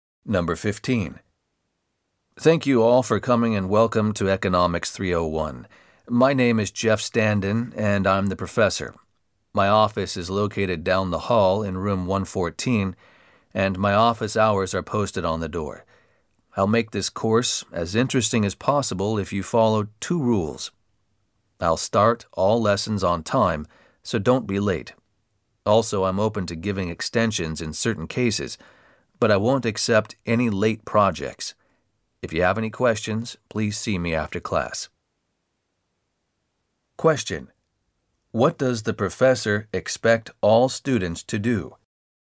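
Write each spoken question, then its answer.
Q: What does the professor expect all students to do?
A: Arrive on time for class and hand in projects on time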